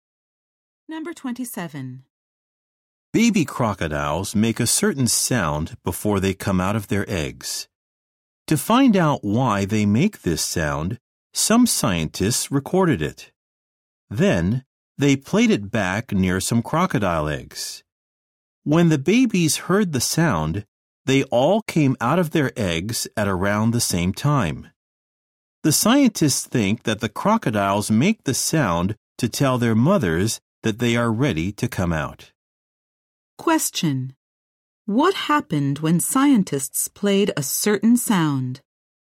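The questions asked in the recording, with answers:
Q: What happened when scientists played a certain sound?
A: Baby crocodiles came out of their eggs at about the same time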